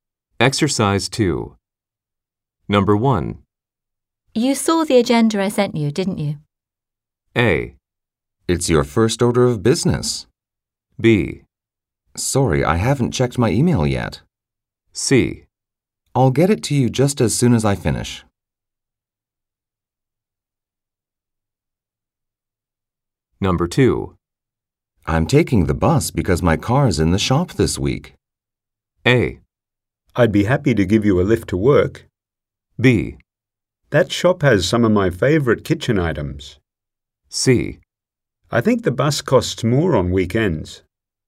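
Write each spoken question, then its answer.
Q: You saw the agenda I sent you, didn't you?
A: B: Sorry, I haven't checked my email yet.

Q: I'm taking the bus because my car is in the shop this week.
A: A: I'd be happy to give you a lift to work.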